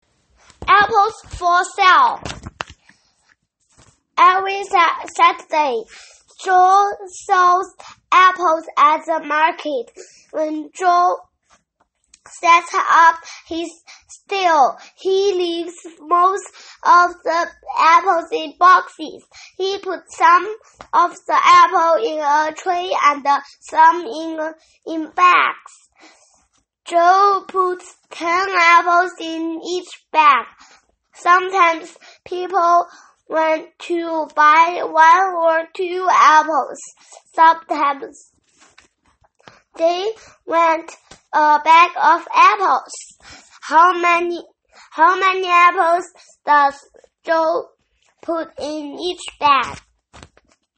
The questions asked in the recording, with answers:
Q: How many apples does Joe put in each bag?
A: Joe puts 10 apples in each bag.